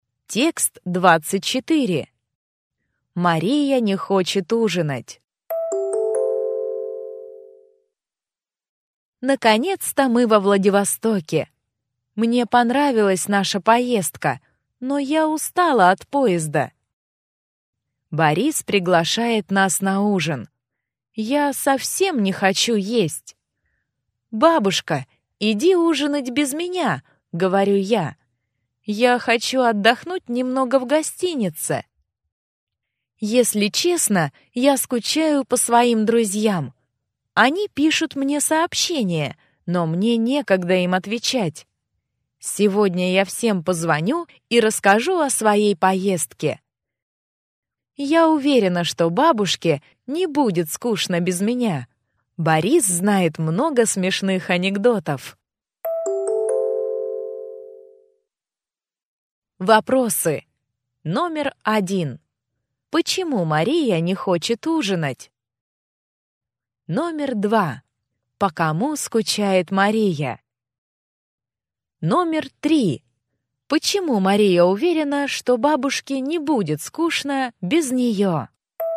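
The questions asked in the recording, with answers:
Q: Почему Мария не хочет ужинать?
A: Она устала от поезда и хочет отдохнуть в гостинице.

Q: По кому скучает Мария?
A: По своим друзьям.

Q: Почему Мария уверена, что бабушке не будет скучно без нее?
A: Борис знает много смешных анекдотов.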